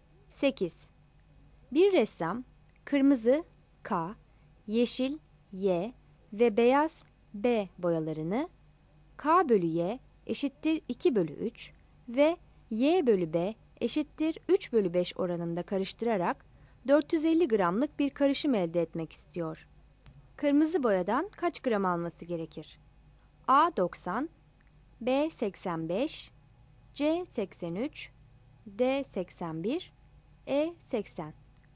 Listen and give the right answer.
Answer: Yanıt A'dır.